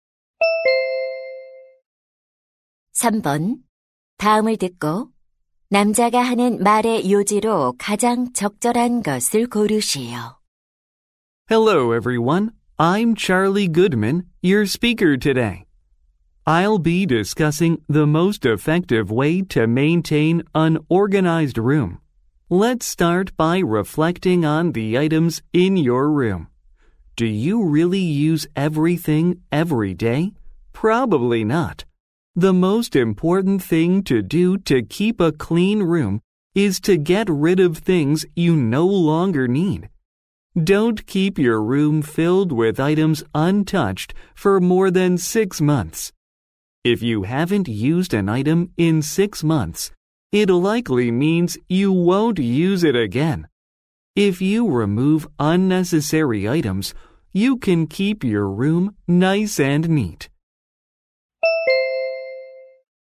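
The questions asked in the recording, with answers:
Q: 다음을 듣고 남자가 하는 말의 요지로 가장 적절한 것을 고르시오.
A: 방을 깨끗하게 유지하려면 더 이상 필요 없는 물건을 버려야 한다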